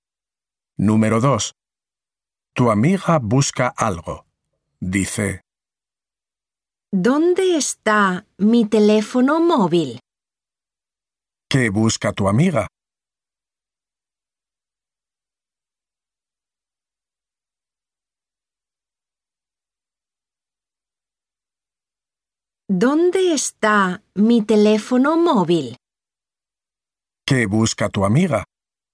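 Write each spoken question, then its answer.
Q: ¿Qué busca tu amiga?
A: Su teléfono móvil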